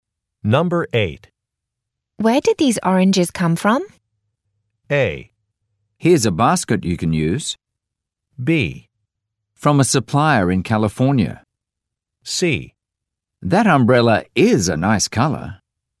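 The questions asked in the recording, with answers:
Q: Where did these oranges come from?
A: B: From a supplier in California.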